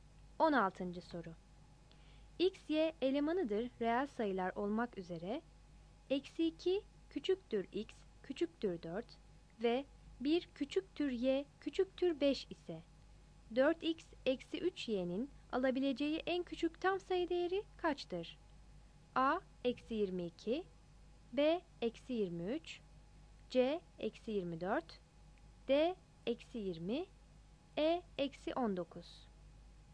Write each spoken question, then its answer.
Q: X, Y elemanıdır reel sayılar olmak üzere, eksi 2 küçüktür x, küçüktür 4 ve 1 küçüktür y, küçüktür 5 ise 4x eksi 3y'nin alabileceği en küçük tam sayı değeri kaçtır?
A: 16 A